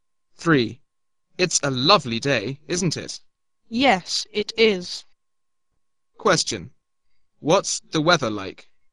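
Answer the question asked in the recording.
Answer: It's a lovely day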